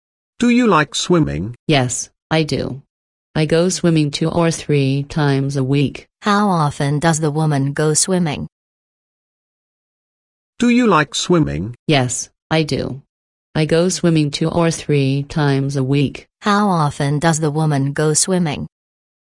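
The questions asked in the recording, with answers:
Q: How often does the woman go swimming?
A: 2 or 3 times a week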